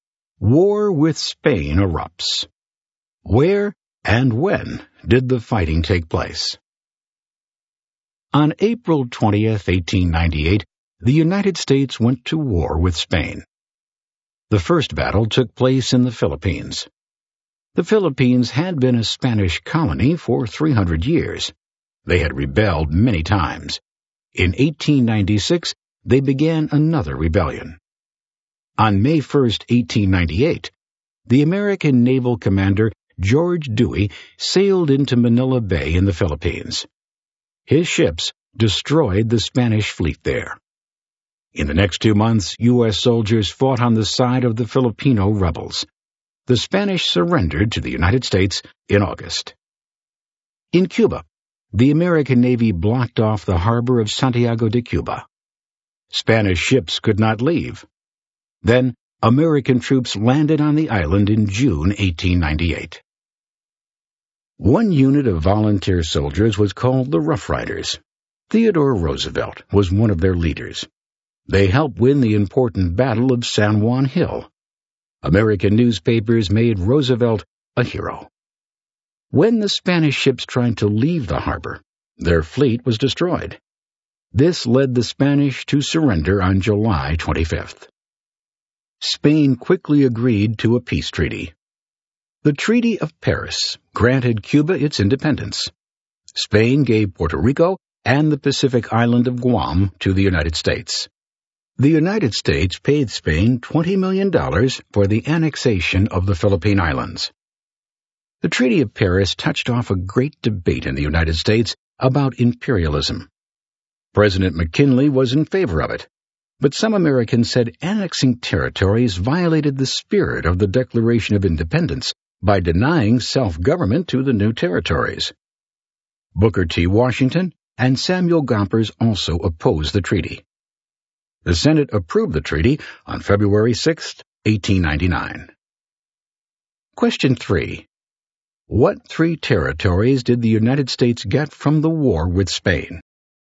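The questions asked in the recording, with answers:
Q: What three territories did the United States get from the war with Spain?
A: Puerto Rico, Guam and the Philippines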